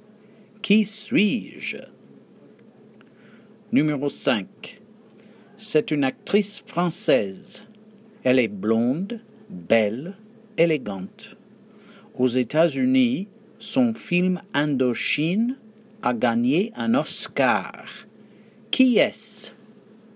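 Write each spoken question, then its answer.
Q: Qui est-ce?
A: Catherine Deneuve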